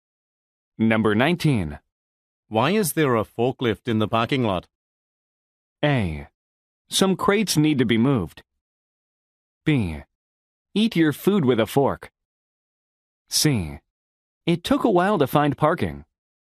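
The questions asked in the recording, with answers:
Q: Why is there a forklift in the parking lot?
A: A: Some crates need to be moved.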